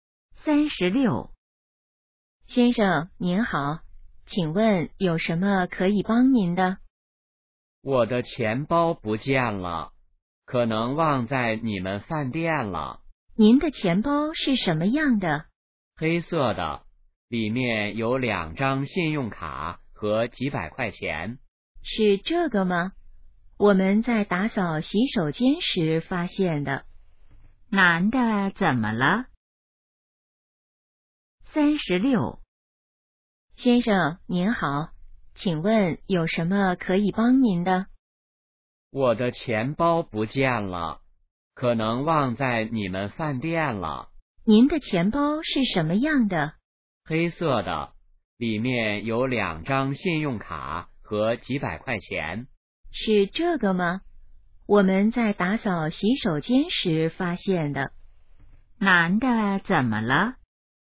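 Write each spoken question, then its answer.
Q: 男的怎么了?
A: 钱包不见了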